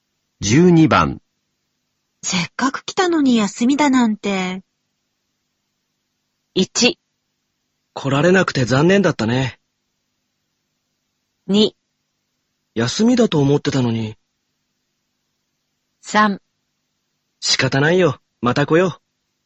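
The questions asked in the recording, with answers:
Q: せっかく来たのに休みだなんて。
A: 3: 仕方ないよ。また来よう。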